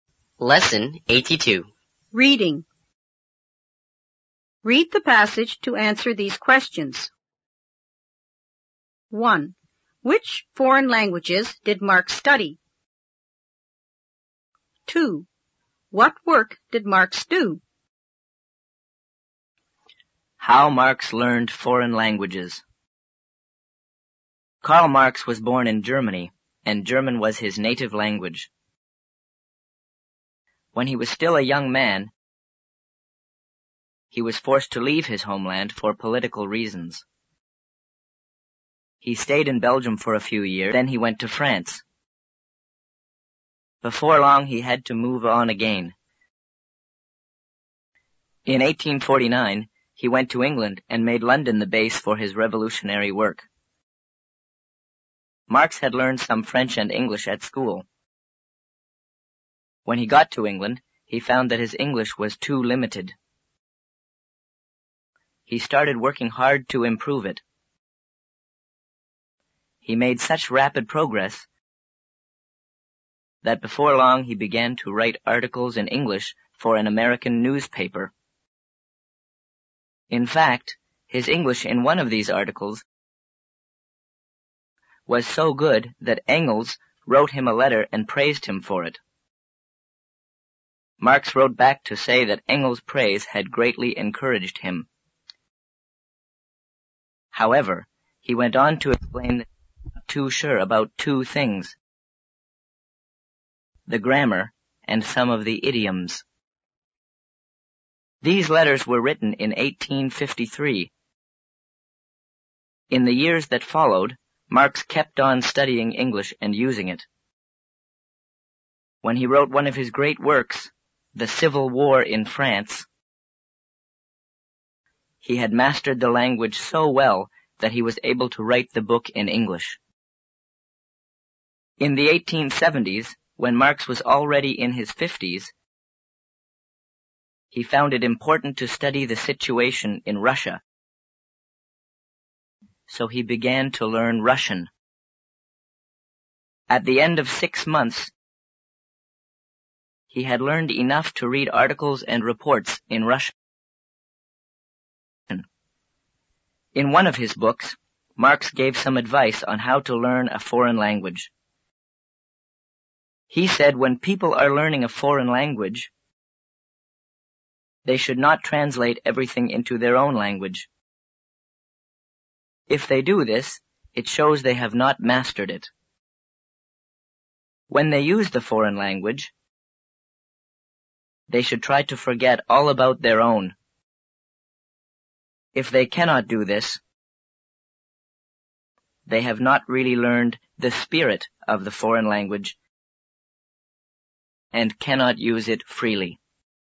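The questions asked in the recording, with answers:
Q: Which foreign languages did Marx study?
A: French, English and Russian

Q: What work did Marx do?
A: Revolutionary work; he wrote articles for an American newspaper and books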